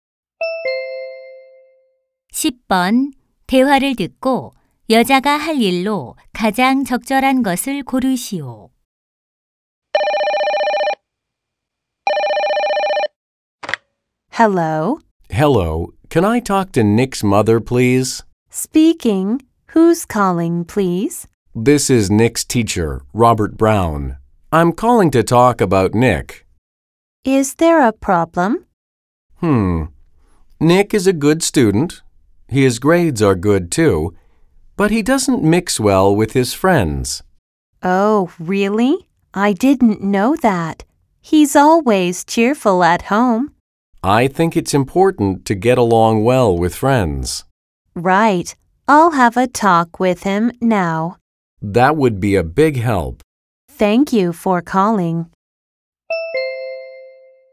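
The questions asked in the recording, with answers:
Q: 대화를 듣고 여자가 할 일로 가장 적절한 것을 고르시오.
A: 아들 Nick과 이야기하기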